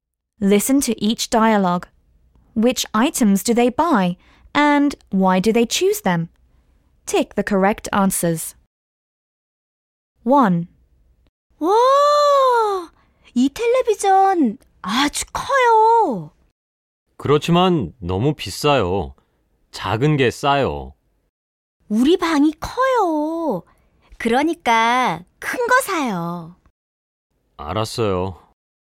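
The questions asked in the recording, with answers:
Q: Which items do they buy and why do they choose them?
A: The big TV, because their room is big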